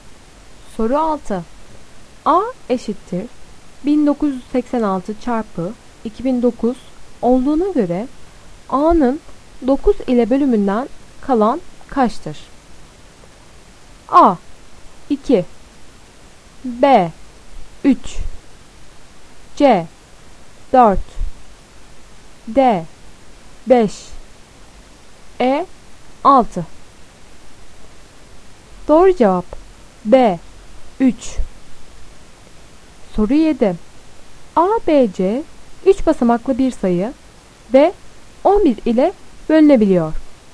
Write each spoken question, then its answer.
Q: A eşittir 1986 çarpı 2009 olduğuna göre A'nın 9 ile bölümünden kalan kaçtır?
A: Doğru cevap B 3